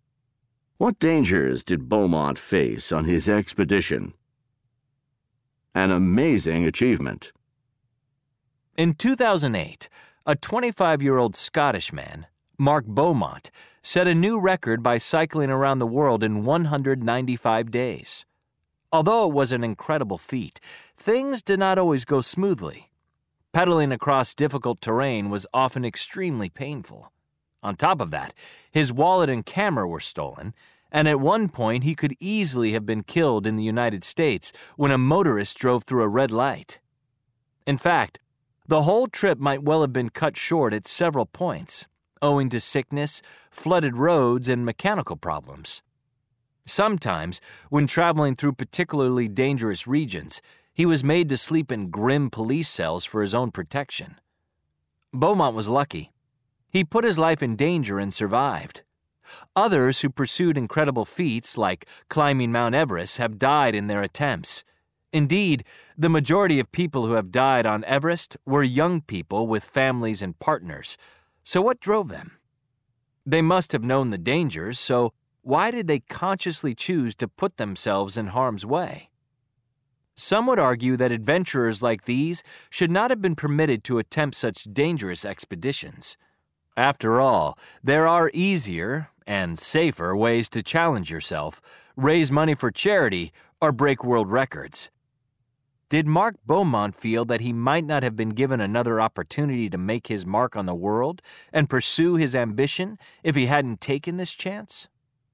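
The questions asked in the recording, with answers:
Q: What dangers did Beaumont face on his expedition?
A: Painful terrain, theft of his wallet and camera, nearly being killed by a motorist, sickness, flooded roads, mechanical problems, and dangerous regions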